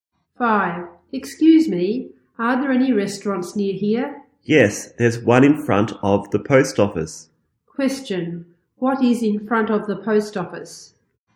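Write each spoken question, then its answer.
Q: What is in front of the post office?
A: A restaurant.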